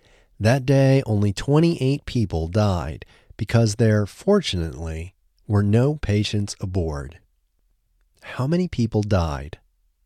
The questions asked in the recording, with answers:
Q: How many people died?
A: 28 people died.